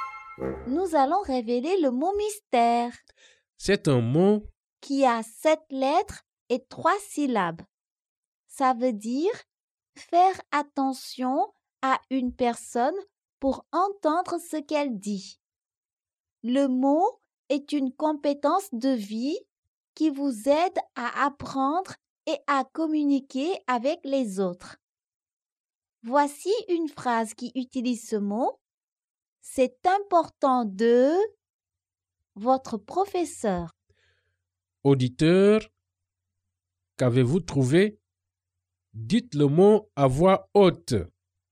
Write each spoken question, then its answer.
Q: Auditeur, qu'avez-vous trouvé?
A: Le mot mystère est écouter.